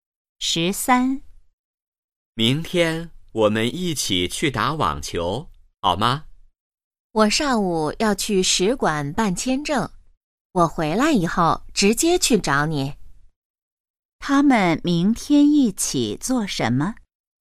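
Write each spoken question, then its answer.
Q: 他们明天一起做什么?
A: 打网球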